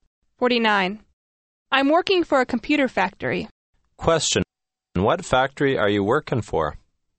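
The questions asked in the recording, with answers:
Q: What factory are you working for?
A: A computer factory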